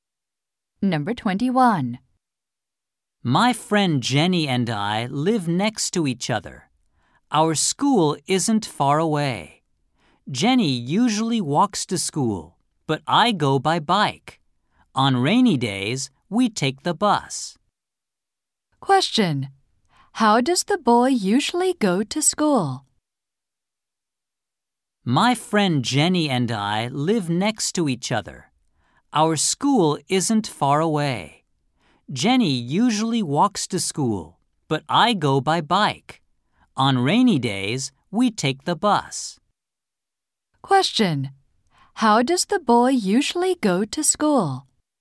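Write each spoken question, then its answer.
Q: How does the boy usually go to school?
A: By bike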